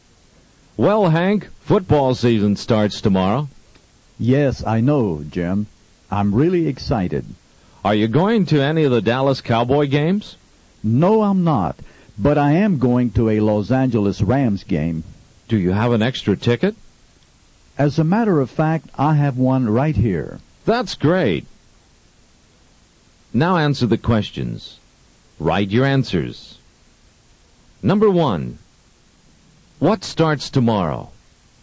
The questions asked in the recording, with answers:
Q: What starts tomorrow?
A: Football season starts tomorrow.